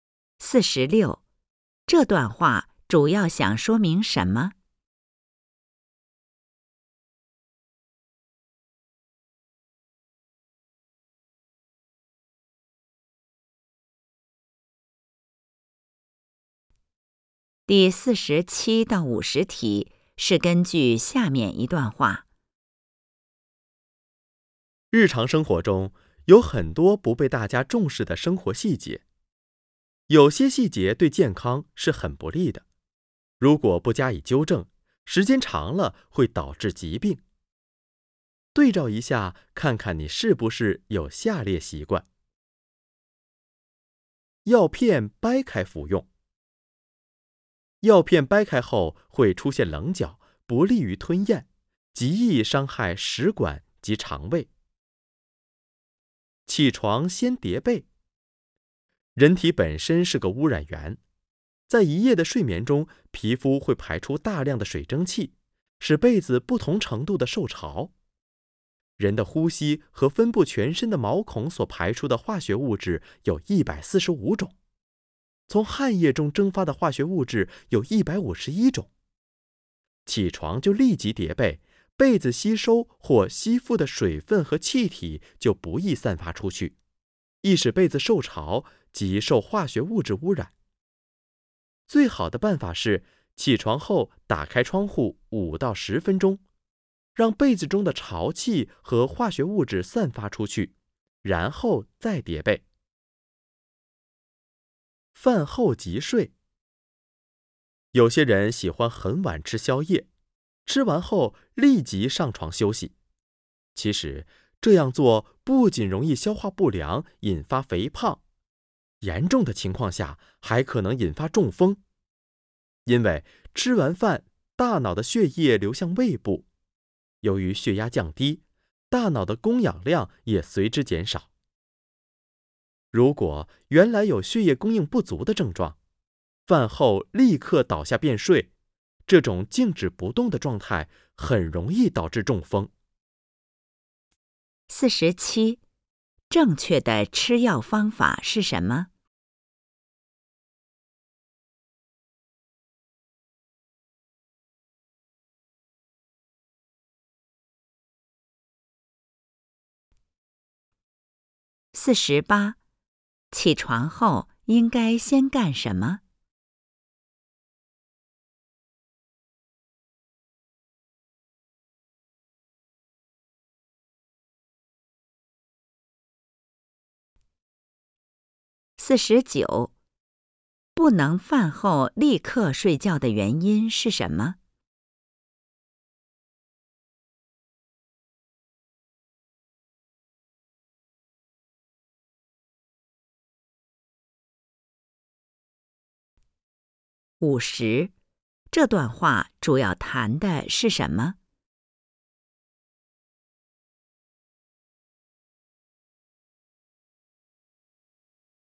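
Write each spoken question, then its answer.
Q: 起床后应该先干什么?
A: 先打开窗户5-10分钟再叠被

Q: 不能饭后立刻睡觉的原因是什么?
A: 容易消化不良、肥胖,严重时可能引发中风

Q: 这段话主要谈的是什么?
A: 不利于健康的生活细节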